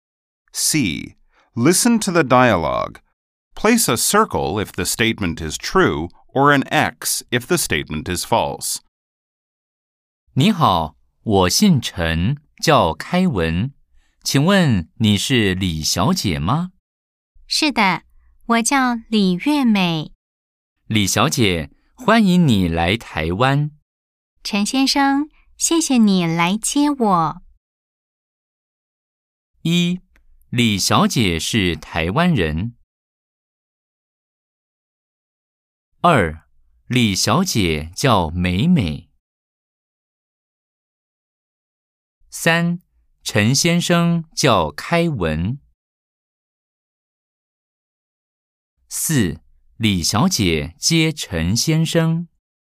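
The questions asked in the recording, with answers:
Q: 李小姐是台湾人。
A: X(错)

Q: 李小姐叫美美。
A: X(错)

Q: 陈先生叫开文。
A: O(对)

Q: 李小姐接陈先生。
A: X(错)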